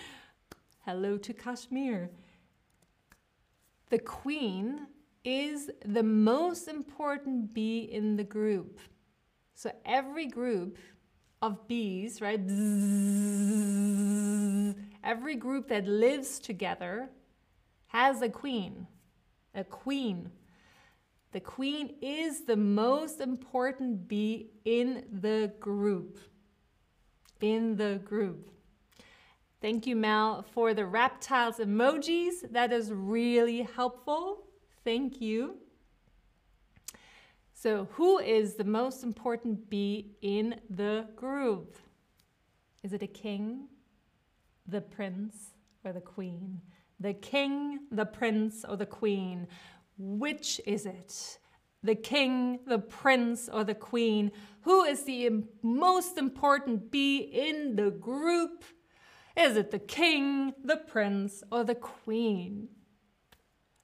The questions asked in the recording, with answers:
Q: Who is the most important bee in the group?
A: Exactly. It is the queen.